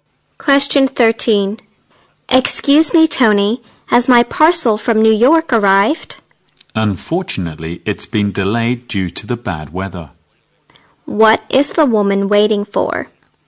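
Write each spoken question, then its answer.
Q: What is the woman waiting for?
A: Her parcel from New York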